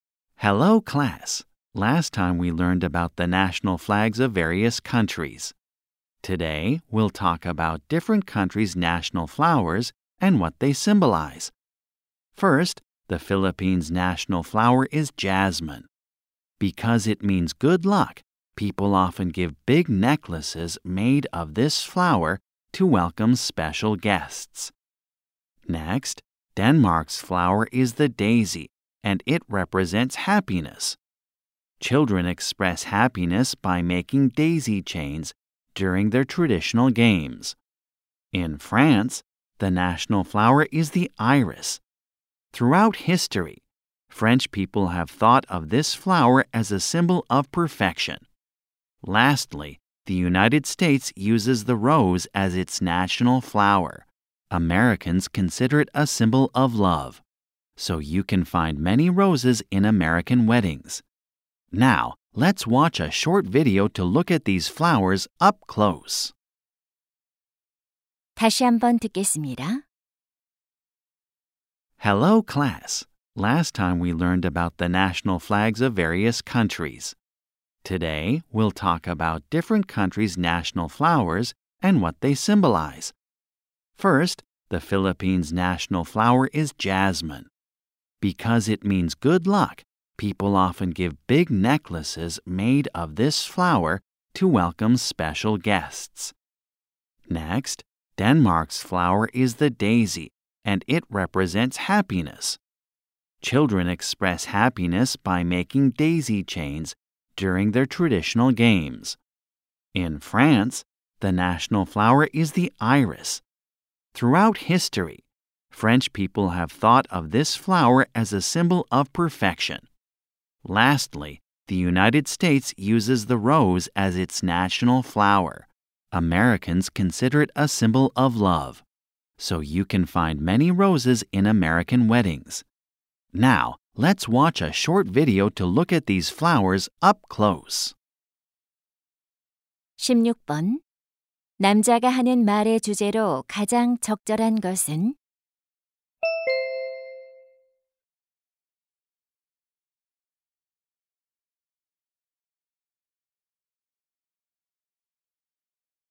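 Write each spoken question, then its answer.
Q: 남자가 하는 말의 주제로 가장 적절한 것은?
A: 여러 나라의 국화와 그 상징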